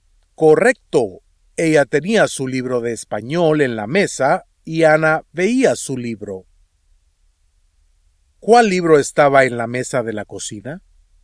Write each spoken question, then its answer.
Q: ¿Cuál libro estaba en la mesa de la cocina?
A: El libro de español de Ana.